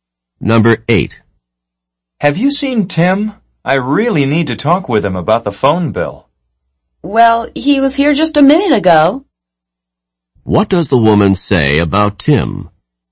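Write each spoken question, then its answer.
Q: What does the woman say about Tim?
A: He was there just a minute ago.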